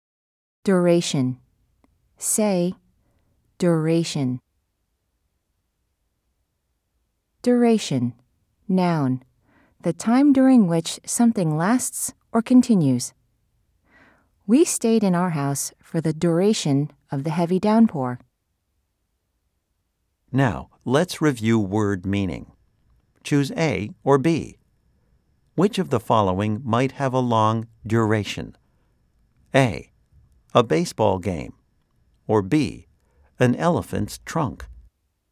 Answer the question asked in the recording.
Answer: If you said A, you are correct.